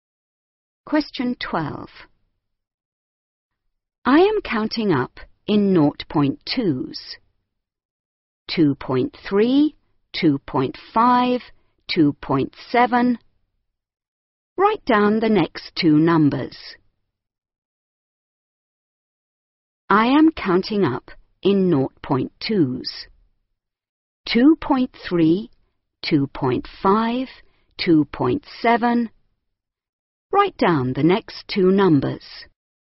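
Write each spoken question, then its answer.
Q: 2.3, 2.5, 2.7. Write down the next two numbers.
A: 2.9, 3.1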